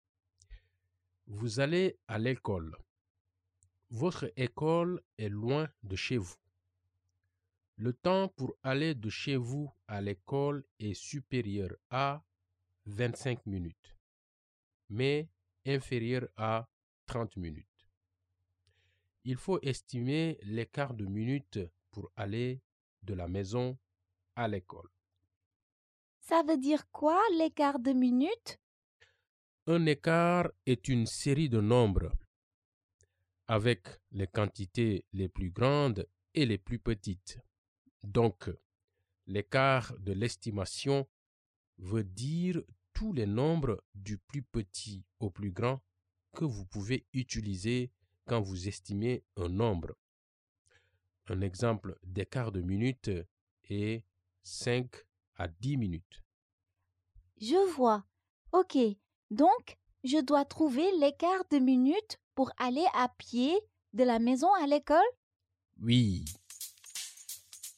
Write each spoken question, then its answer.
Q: Il faut estimer l'écart de minutes pour aller de la maison à l'école.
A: Je pense que ça va prendre de 26 à 29 minutes.